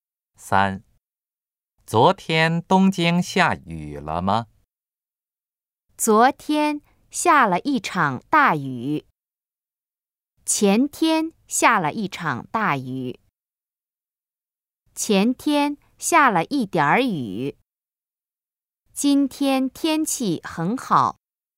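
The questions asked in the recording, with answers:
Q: 昨天东京下雨了吗?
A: A: 昨天下了一场大雨。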